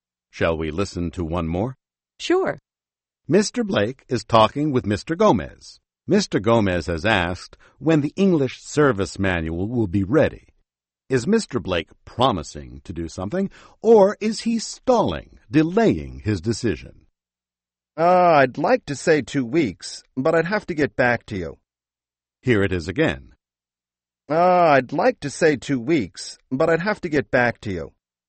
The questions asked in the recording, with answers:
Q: Is Mr. Blake promising to do something, or is he stalling, delaying his decision?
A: So he's delaying. He's stalling.